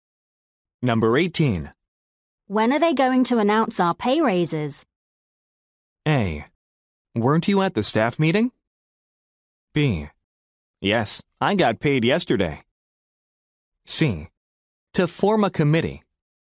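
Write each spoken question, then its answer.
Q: When are they going to announce our pay raises?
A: A: Weren't you at the staff meeting?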